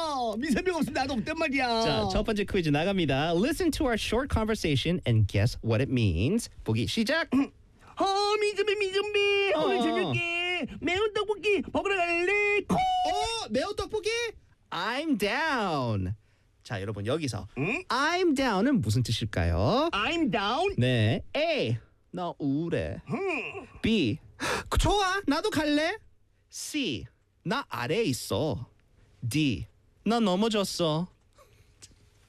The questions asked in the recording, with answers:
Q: 자, 여러분 여기서 I'm down은 무슨 뜻일까요?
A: 바로 B입니다.